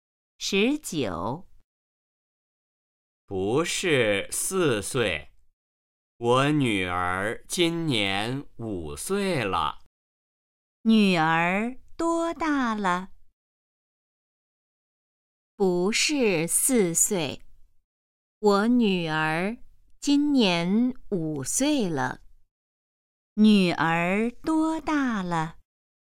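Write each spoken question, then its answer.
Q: 女儿多大了?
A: 五岁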